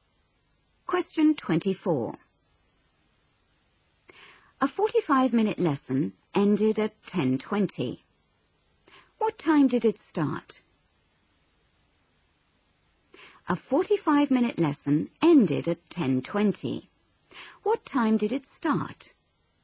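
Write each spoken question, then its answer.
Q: What time did it start?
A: 9:35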